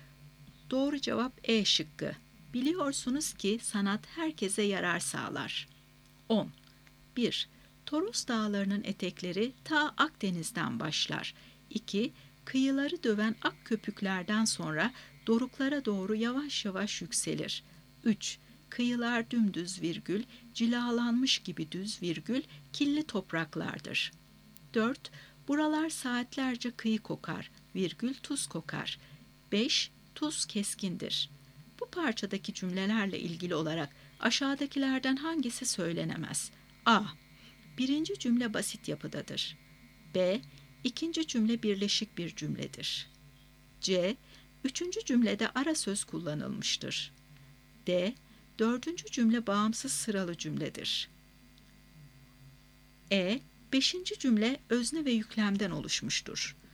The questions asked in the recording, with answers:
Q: Bu parçadaki cümlelerle ilgili olarak aşağıdakilerden hangisi söylenemez?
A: Doğru cevap D şıkkı. Dördüncü cümle bağımsız sıralı cümledir.